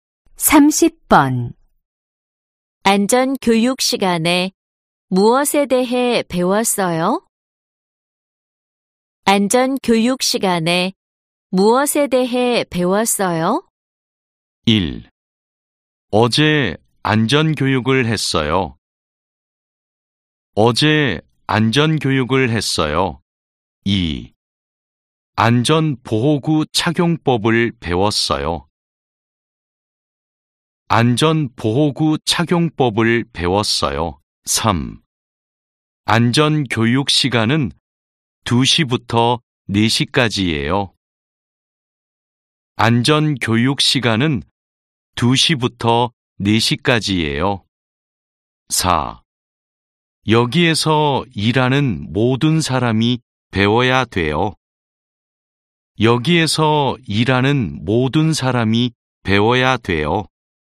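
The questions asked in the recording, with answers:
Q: 안전 교육 시간에 무엇에 대해 배웠어요?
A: 2: 안전 보호구 착용법을 배웠어요.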